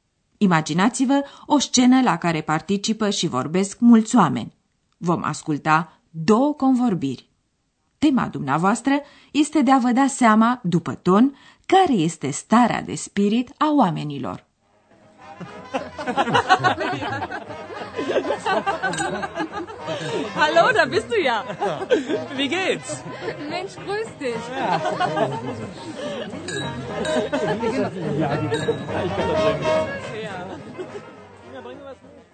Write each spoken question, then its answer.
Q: Tema dumneavoastră este de a vă da seama, după ton, care este starea de spirit a oamenilor.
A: Oamenii sunt veseli, nu-i așa?